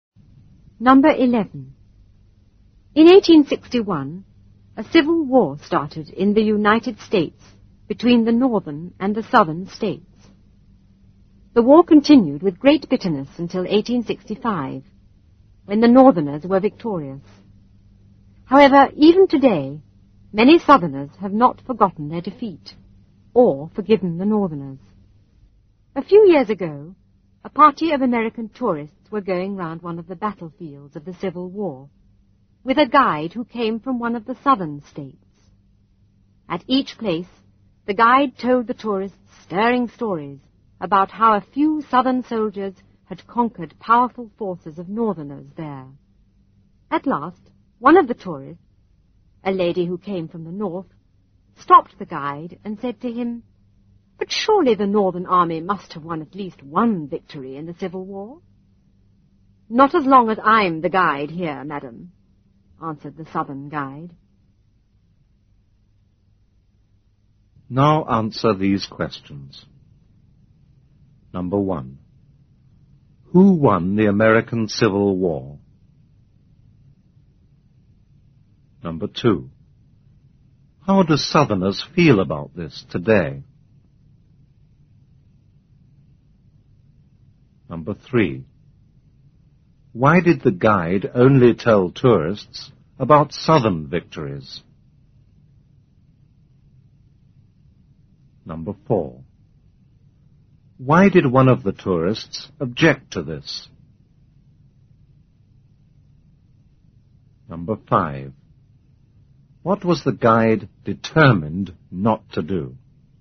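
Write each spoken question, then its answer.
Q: Who won the American Civil War?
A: The northerners

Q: How do Southerners feel about this today?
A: Many have not forgotten their defeat or forgiven the northerners

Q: Why did the guide only tell tourists about Southern victories?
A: Because he came from the South and had not forgiven the northerners for the defeat

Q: Why did one of the tourists object to this?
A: She came from the North

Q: What was the guide determined not to do?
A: Tell tourists about any Northern victory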